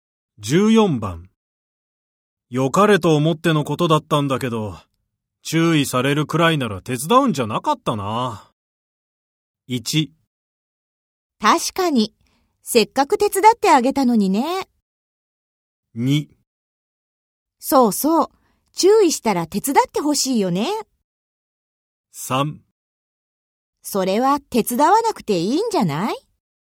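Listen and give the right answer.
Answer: 1: 確かに、せっかく手伝ってあげたのにね。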